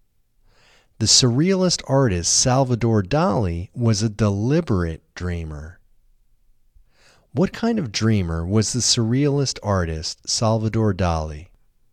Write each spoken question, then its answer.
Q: What kind of dreamer was the surrealist artist Salvador Dali?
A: The surrealist artist Salvador Dali was a deliberate dreamer.